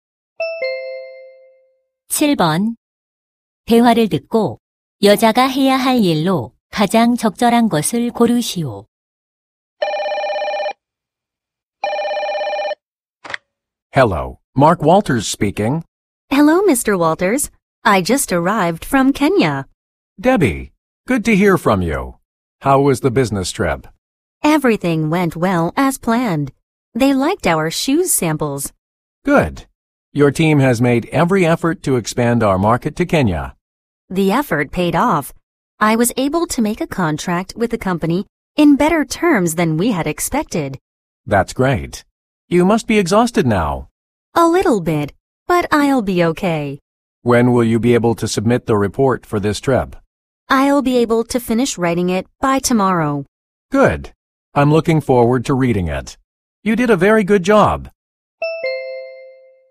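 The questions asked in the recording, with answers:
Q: 대화를 듣고 여자가 해야 할 일로 가장 적절한 것을 고르시오.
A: 출장 보고서 작성하기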